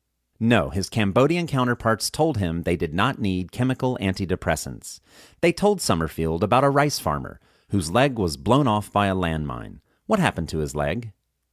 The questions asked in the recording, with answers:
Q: What happened to his leg?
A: His leg was blown off by a landmine.